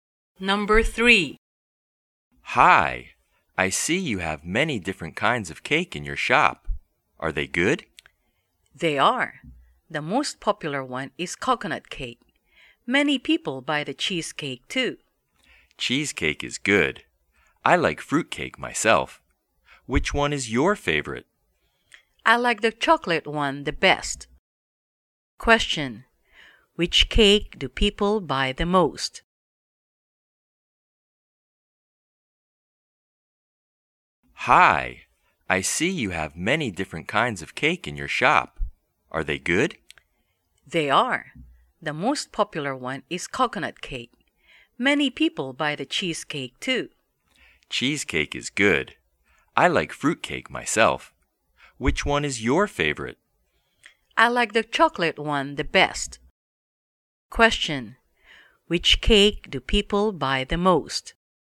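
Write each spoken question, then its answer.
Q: Which cake do people buy the most?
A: Coconut cake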